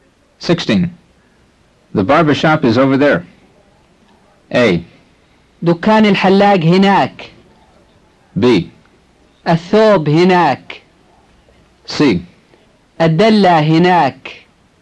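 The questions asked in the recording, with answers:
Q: The barber shop is over there.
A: A: دكان الحلاق هناك.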